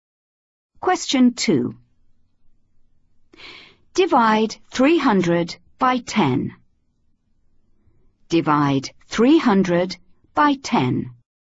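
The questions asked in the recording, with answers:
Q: Divide 300 by 10.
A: 30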